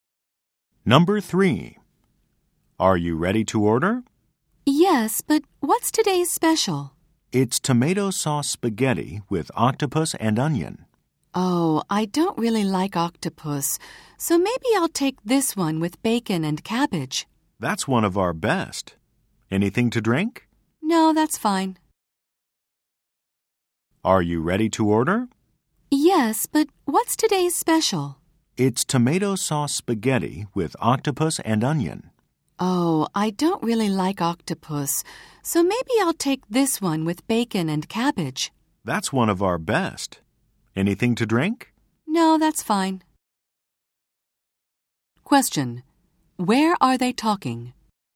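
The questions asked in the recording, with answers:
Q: Question: Where are they talking?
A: At a restaurant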